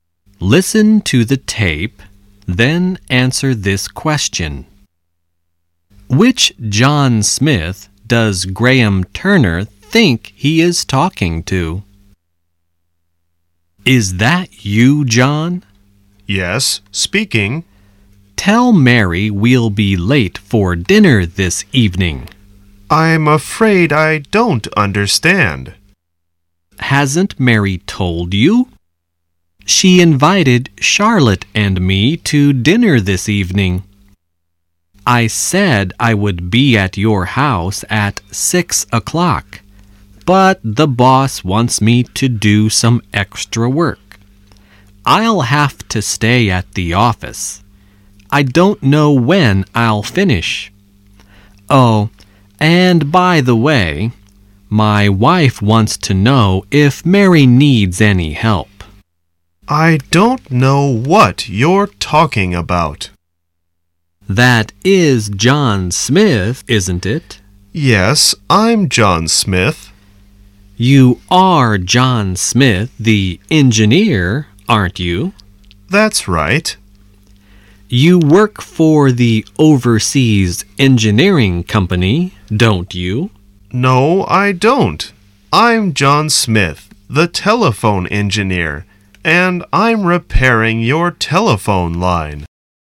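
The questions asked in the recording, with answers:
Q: Which John Smith does Graham Turner think he is talking to?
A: John Smith the engineer who works for the Overseas Engineering Company (Mary's husband)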